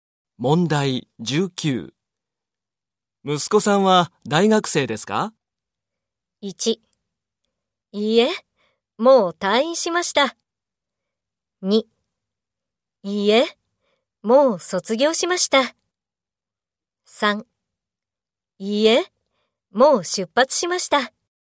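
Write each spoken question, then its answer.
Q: 息子さんは大学生ですか?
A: 1: いいえ、もう卒業しました。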